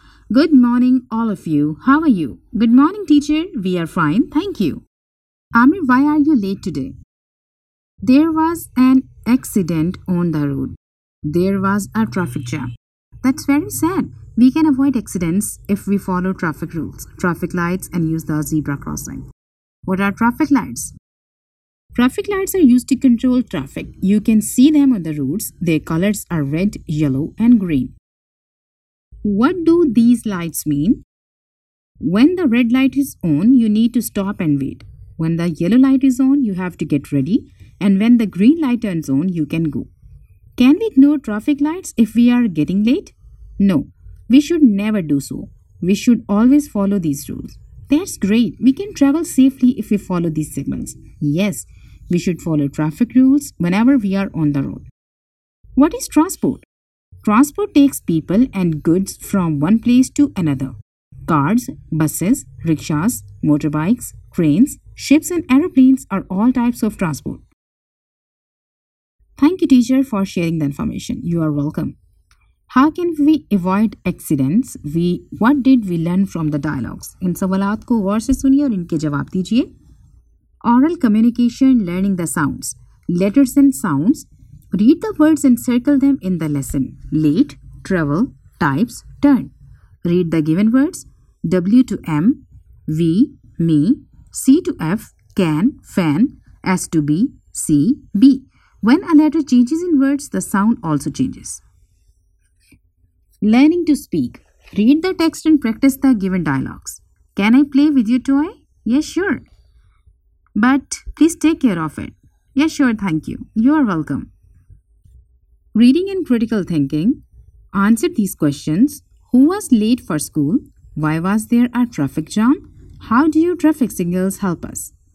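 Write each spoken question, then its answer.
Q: Why was there a traffic jam?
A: There was an accident on the road.

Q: How do your traffic signals help us?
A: They control traffic so we can travel safely.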